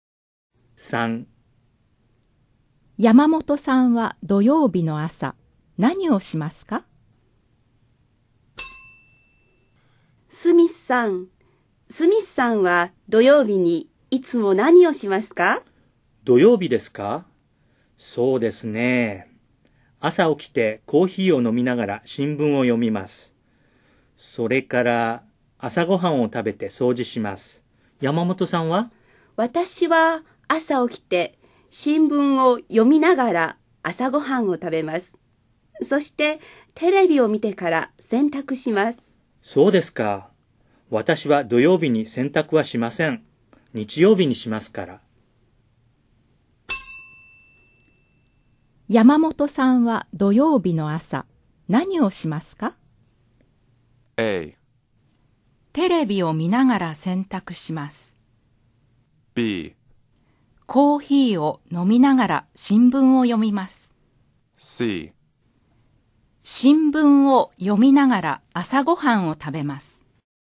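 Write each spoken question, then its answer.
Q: 山本さんは土曜日の朝、何をしますか?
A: C: 新聞を読みながら朝ごはんを食べます。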